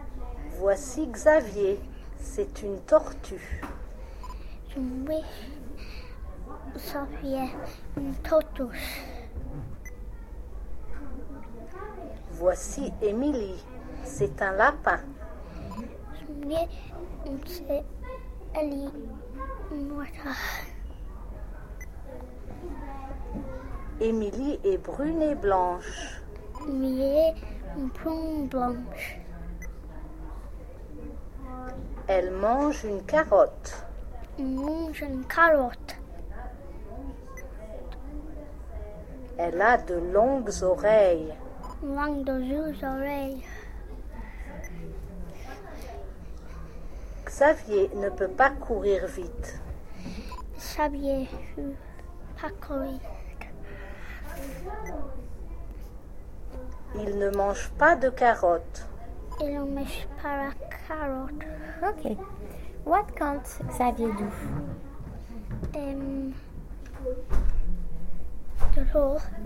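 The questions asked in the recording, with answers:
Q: What can't Xavier do?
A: Run fast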